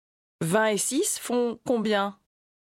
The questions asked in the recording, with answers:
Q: 20 et 6 font combien?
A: 26.